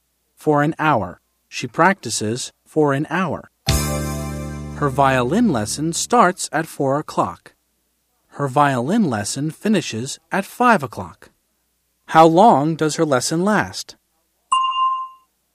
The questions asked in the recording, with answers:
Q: How long does her lesson last?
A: An hour. It lasts an hour.